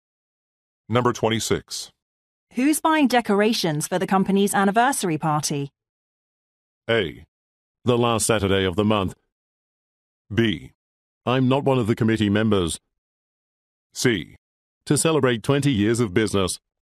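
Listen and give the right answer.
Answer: B: I'm not one of the committee members.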